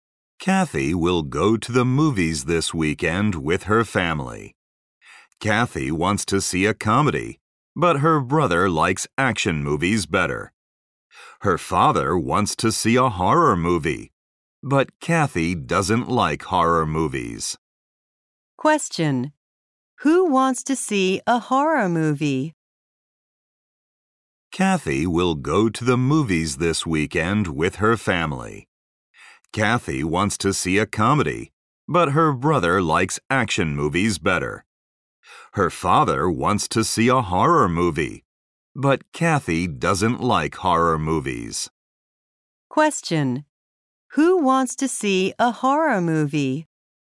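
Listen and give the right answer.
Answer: Kathy's father.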